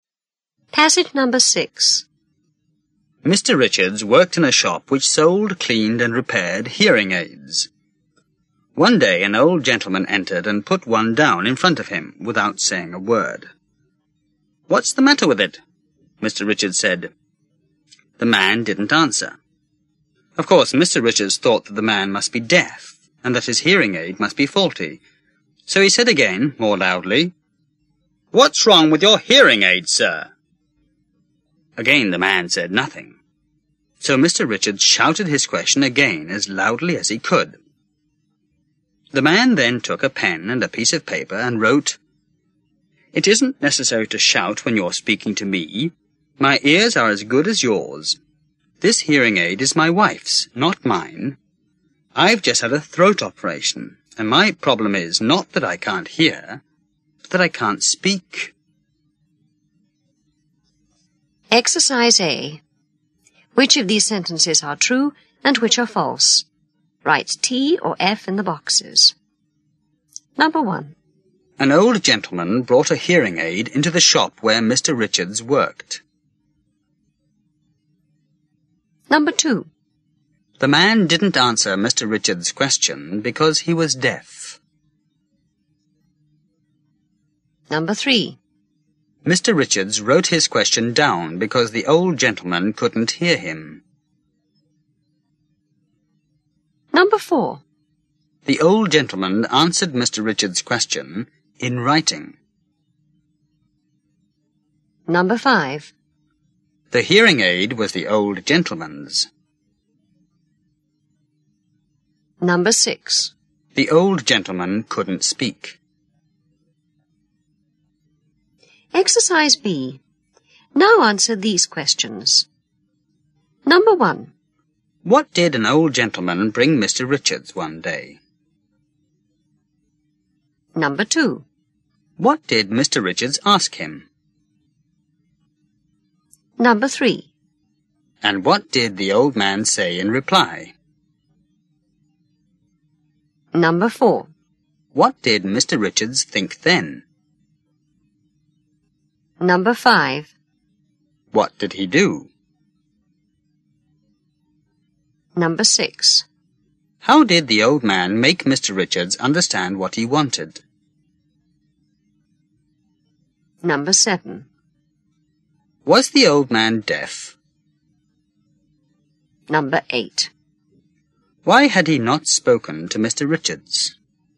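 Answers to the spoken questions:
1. True
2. False
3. False
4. True
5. False
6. True
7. A hearing aid
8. What was wrong with the hearing aid
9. Nothing
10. That the man was deaf and his hearing aid was faulty
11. He asked again more loudly, then shouted
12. He wrote on a piece of paper
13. No
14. He had just had a throat operation and couldn't speak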